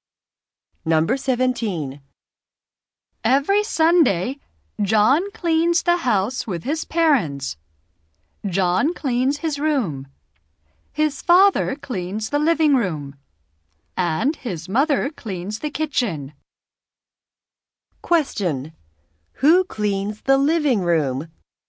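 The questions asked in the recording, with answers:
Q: Who cleans the living room?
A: John's father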